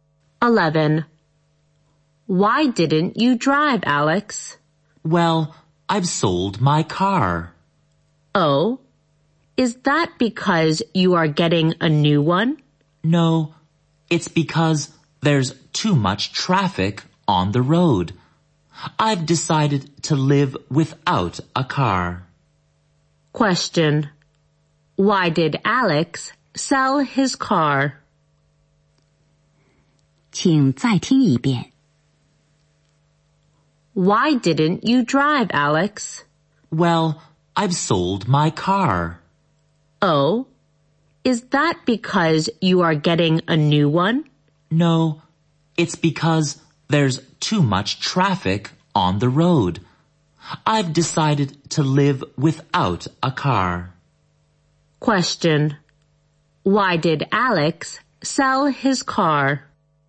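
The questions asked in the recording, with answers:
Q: Question. Why did Alex sell his car?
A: Because there's too much traffic on the road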